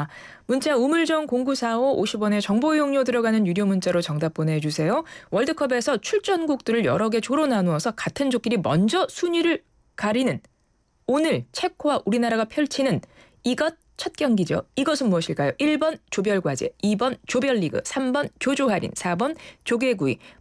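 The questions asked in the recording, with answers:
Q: 이것은 무엇일까요? 1번 조별과제, 2번 조별리그, 3번 조조할인, 4번 조개구이.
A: 2: 조별리그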